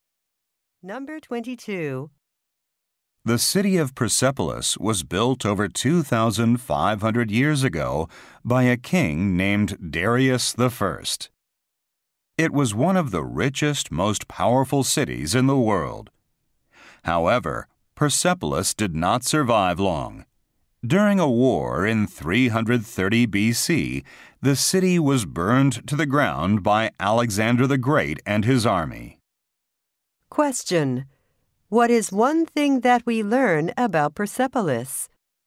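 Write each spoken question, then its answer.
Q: Question: What is one thing that we learn about Persepolis?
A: It was burned down by Alexander the Great.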